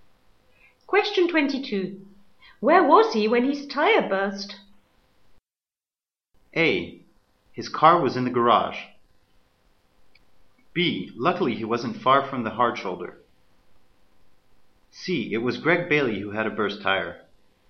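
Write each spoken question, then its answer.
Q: Where was he when his tire burst?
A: B: Luckily he wasn't far from the hard shoulder.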